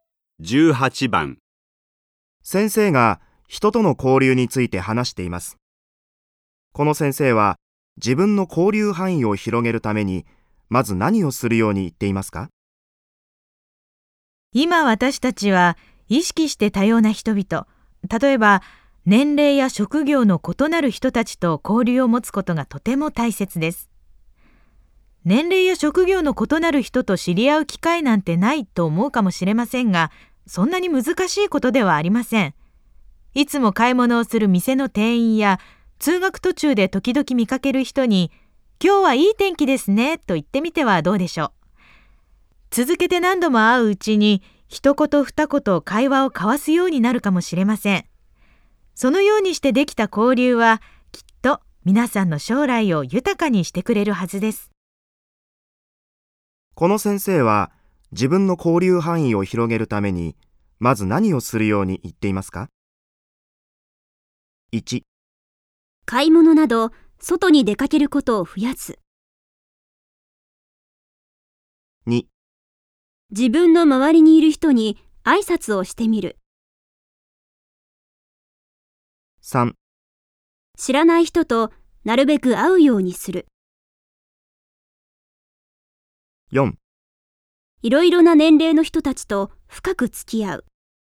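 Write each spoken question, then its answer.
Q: この先生は自分の交流範囲を広げるためにまず何をするように言っていますか?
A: 2: 自分の周りにいる人に挨拶をしてみる。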